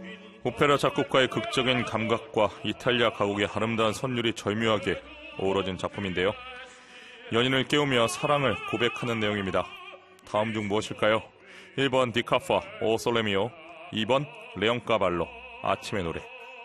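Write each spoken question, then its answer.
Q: 연인을 깨우며 사랑을 고백하는 내용입니다. 다음 중 무엇일까요?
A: 2번: 레옹 까발로 아침의 노래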